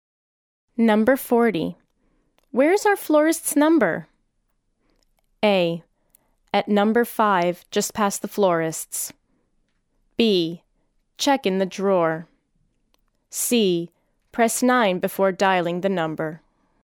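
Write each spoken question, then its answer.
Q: Where is our florist's number?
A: B: Check in the drawer.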